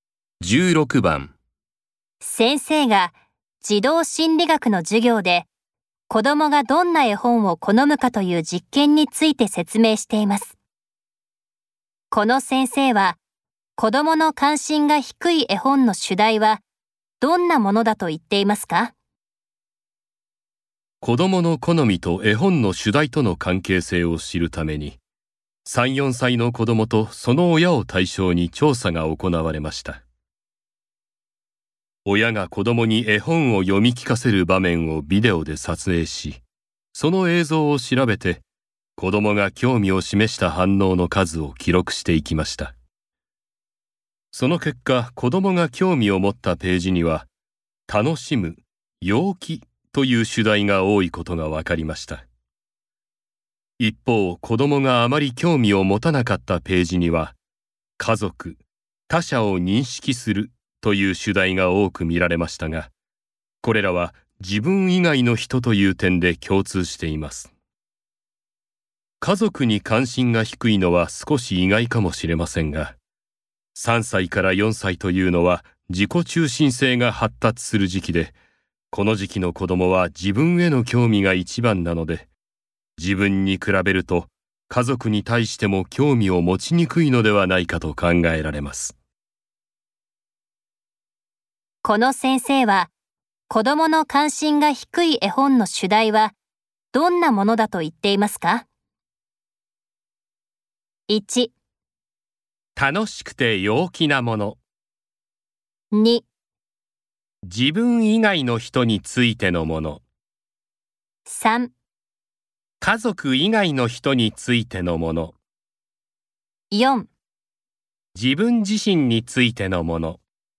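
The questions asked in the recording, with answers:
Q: この先生は、子供の関心が低い絵本の主題は、どんなものだと言っていますか?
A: 2: 自分以外の人についてのもの。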